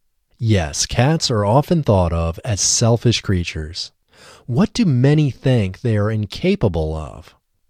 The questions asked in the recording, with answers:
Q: What do many think they are incapable of?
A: Many think they are incapable of unconditional love.